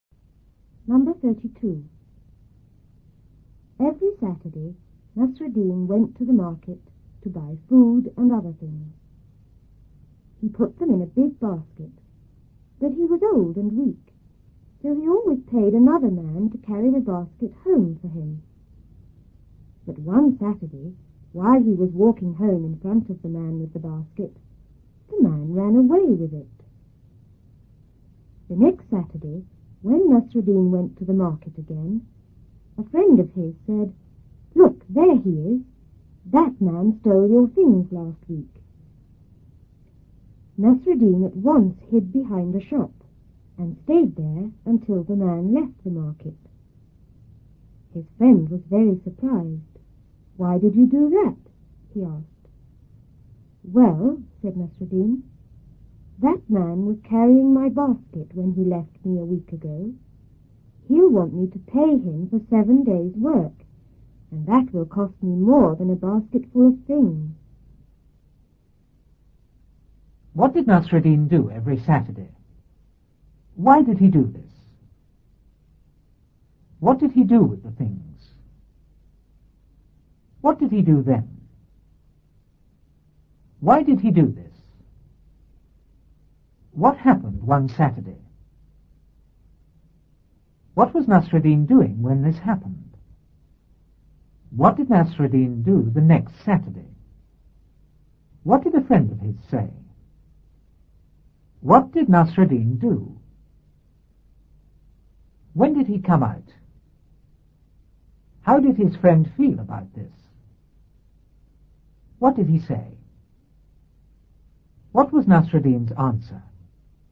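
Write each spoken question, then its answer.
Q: What did Nasruddin do every Saturday?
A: He went to the market to buy food and other things.

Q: What happened one Saturday?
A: The man carrying his basket ran away with it.

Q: What was Nasruddin doing when this happened?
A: Walking home in front of the man with the basket.

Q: What did a friend of his say?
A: "Look, there he is. That man stole your things last week."

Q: What did Nasruddin do?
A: He hid behind a shop.

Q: When did he come out?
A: When the man left the market.

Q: How did his friend feel about this?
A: Very surprised.

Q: What was Nasruddin's answer?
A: The man would want to be paid for 7 days' work, which would cost more than a basket full of things.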